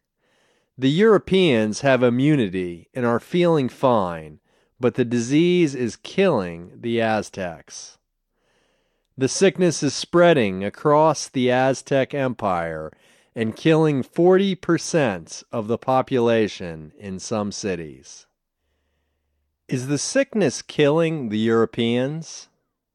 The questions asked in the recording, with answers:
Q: Is the sickness killing the Europeans?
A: No, it's not killing the Europeans, it's killing the Aztecs.